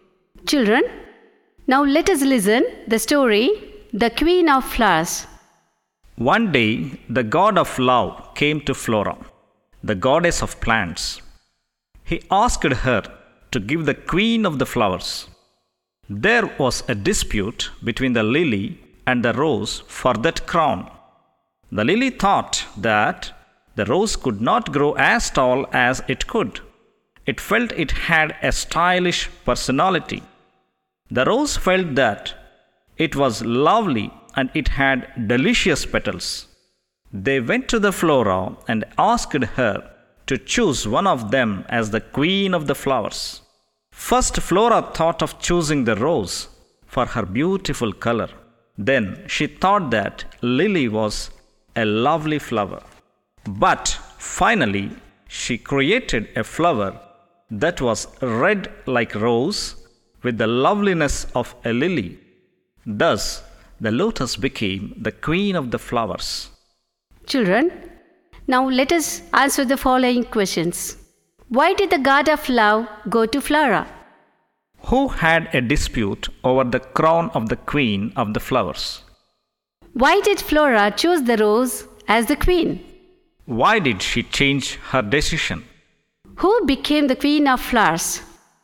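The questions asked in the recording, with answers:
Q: Why did the god of love go to Flora?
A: To ask her to give the queen of the flowers

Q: Who had a dispute over the crown of the queen of the flowers?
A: The lily and the rose

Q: Why did Flora choose the rose as the queen?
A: For her beautiful color

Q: Why did she change her decision?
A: She thought the lily was also a lovely flower

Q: Who became the queen of flowers?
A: The lotus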